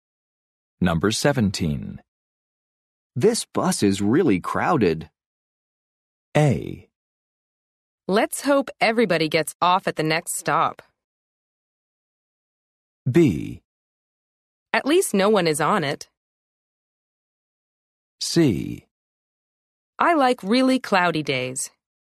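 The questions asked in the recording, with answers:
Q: This bus is really crowded.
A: A: Let's hope everybody gets off at the next stop.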